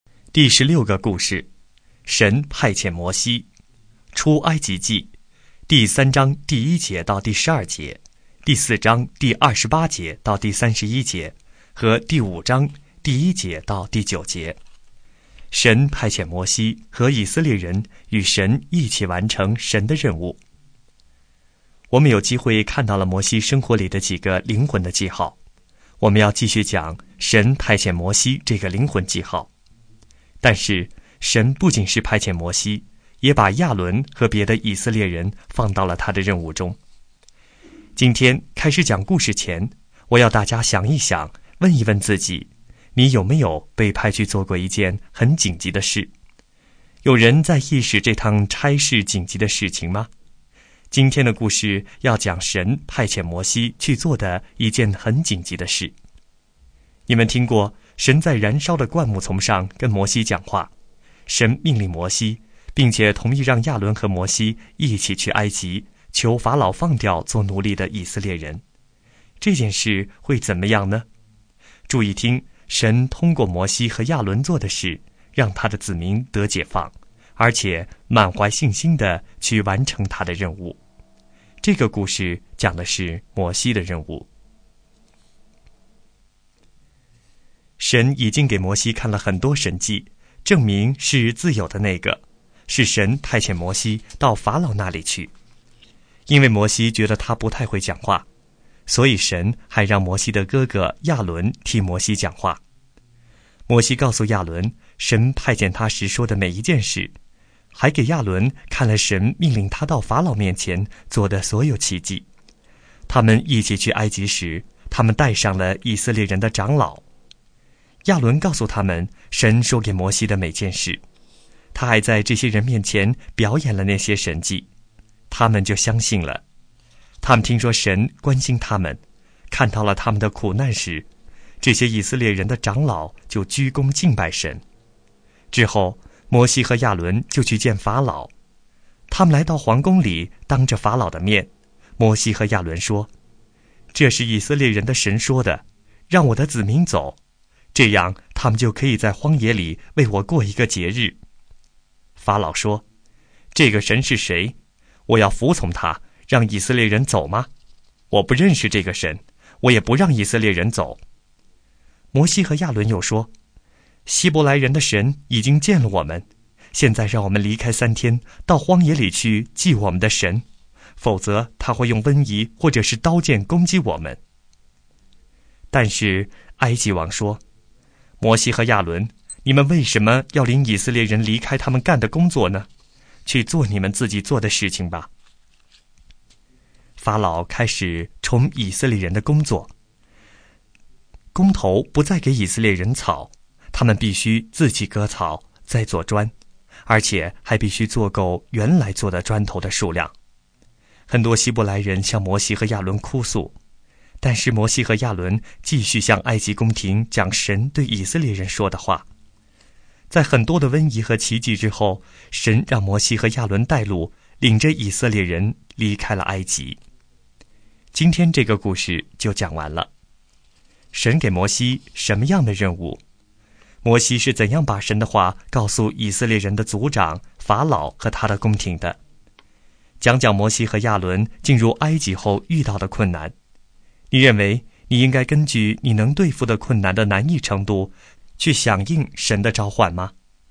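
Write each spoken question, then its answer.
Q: 神给摩西什么样的任务?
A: 去埃及求法老放走做奴隶的以色列人,领他们离开埃及

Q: 摩西是怎样把神的话告诉以色列人的族长法老和他的宫廷的?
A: 通过哥哥亚伦替他讲话,并表演神迹

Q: 讲讲摩西和亚伦进入埃及后遇到的困难。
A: 法老不让以色列人走,还加重他们的工作,不给草却要做够砖,以色列人向他们哭诉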